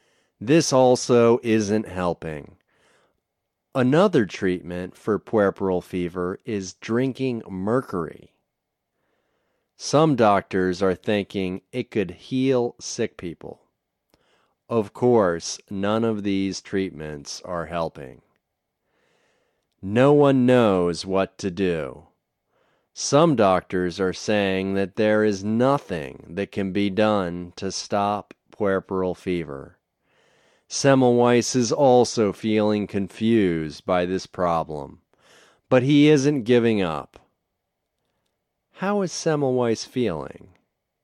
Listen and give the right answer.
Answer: He is feeling confused.